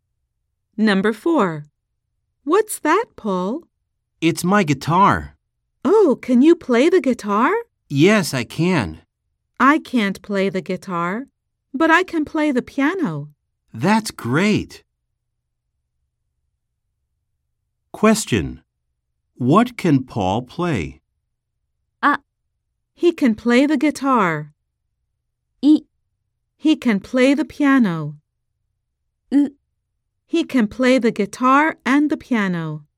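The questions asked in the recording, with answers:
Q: What can Paul play?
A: A: He can play the guitar.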